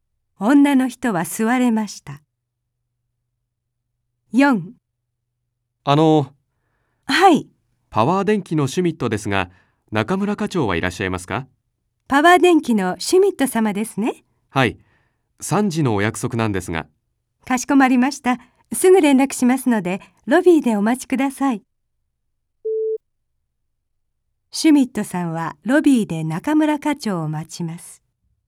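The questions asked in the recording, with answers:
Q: シュミットさんはロビーで中村課長を待ちます。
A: はい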